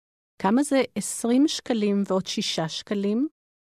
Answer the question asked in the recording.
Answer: 26 שקלים.